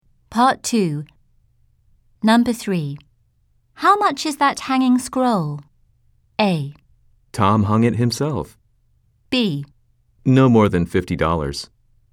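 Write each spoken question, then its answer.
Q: How much is that hanging scroll?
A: B: No more than $50.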